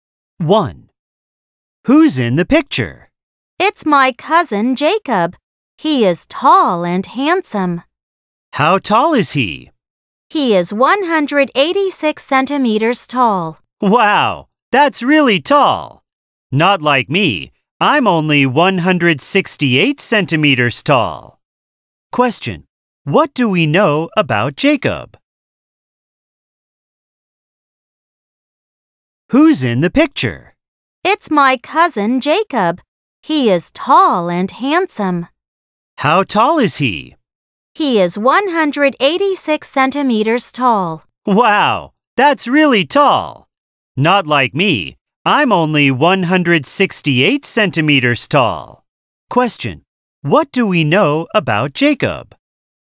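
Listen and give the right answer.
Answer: He is tall (186 cm) and handsome.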